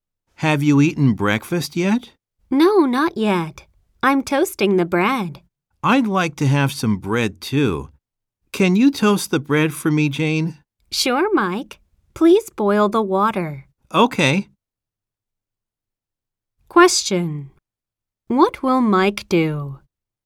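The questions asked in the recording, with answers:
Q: What will Mike do?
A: He will boil the water.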